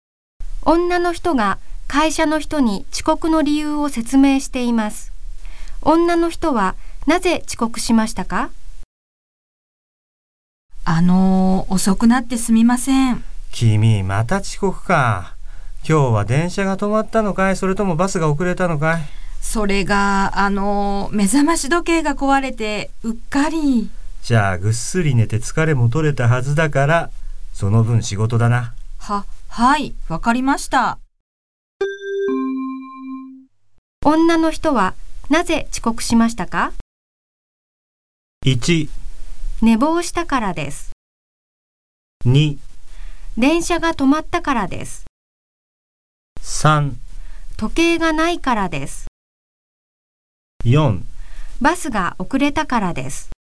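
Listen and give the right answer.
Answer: 1: 寝坊したからです。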